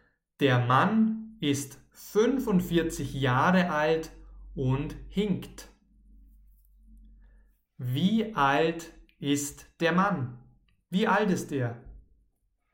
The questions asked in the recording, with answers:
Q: Wie alt ist der Mann? Wie alt ist er?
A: 45. Der Mann ist 45 Jahre alt.